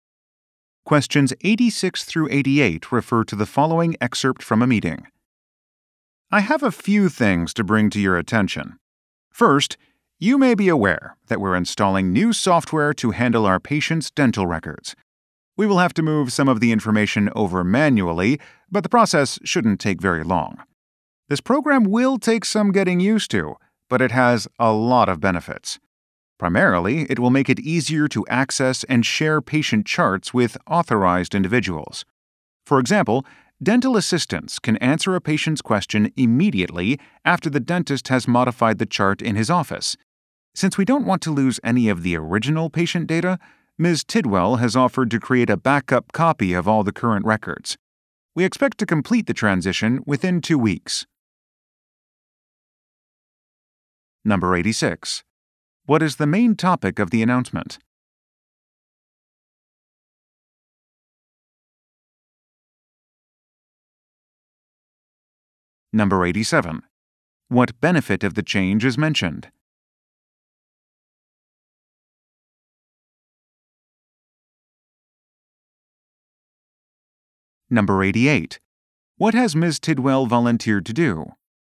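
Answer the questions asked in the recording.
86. New software for patients' dental records
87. Easier access to and sharing of patient charts
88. Create a backup copy of the current records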